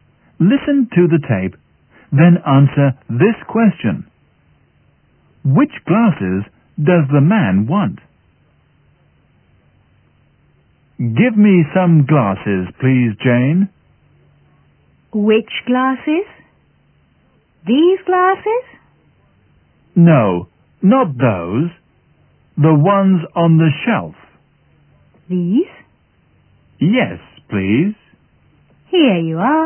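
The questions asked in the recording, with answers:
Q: Which glasses does the man want?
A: The ones on the shelf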